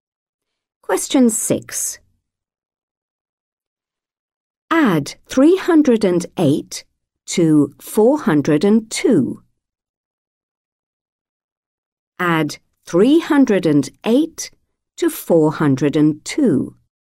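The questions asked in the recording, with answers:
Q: Add 308 to 402.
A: 710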